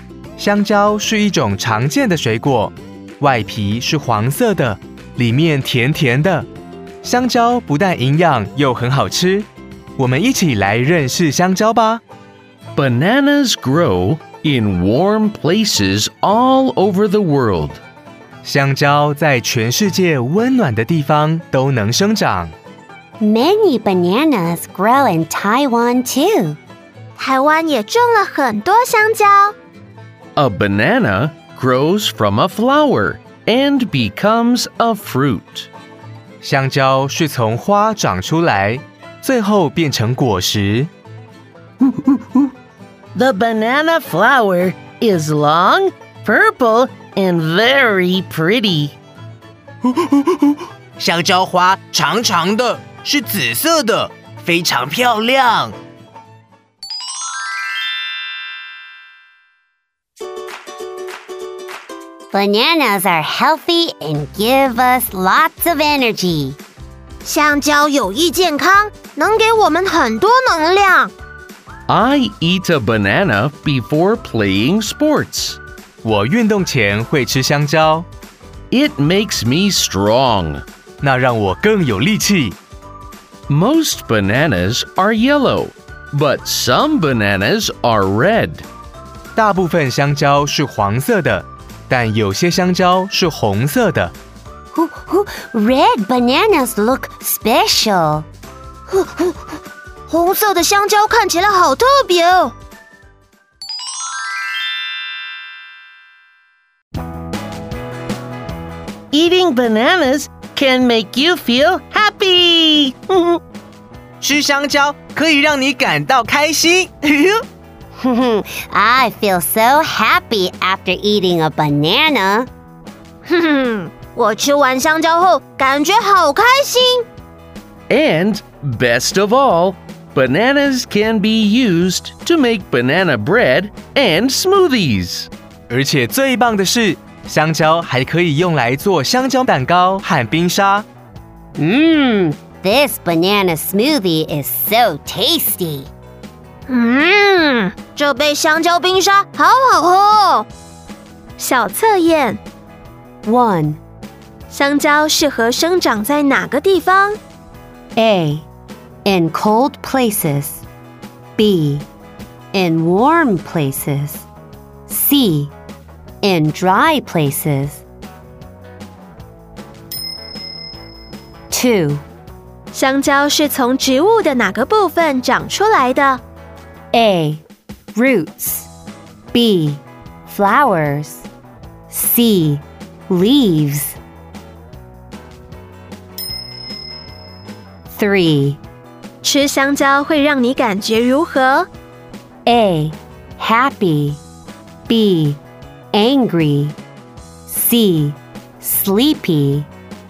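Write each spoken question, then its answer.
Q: 香蕉适合生长在哪个地方?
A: B: In warm places.

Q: 香蕉是从植物的哪个部分长出来的?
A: B: Flowers.

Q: 吃香蕉会让你感觉如何?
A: A: Happy.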